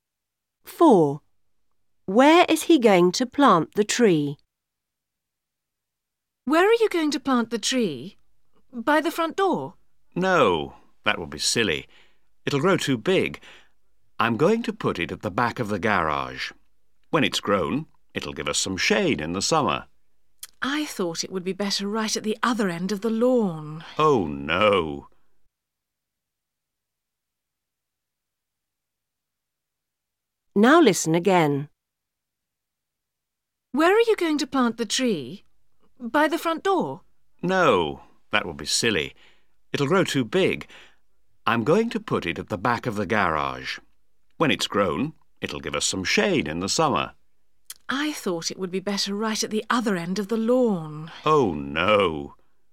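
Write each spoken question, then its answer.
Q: Where is he going to plant the tree?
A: At the back of the garage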